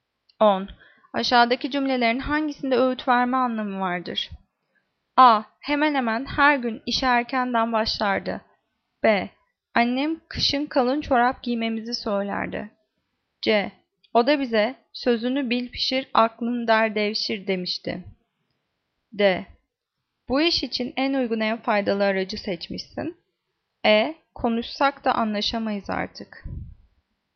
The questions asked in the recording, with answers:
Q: Aşağıdaki cümlelerin hangisinde öğüt verme anlamı vardır?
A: Cevap C. O da bize sözünü bil pişir, aklını der devşir demişti.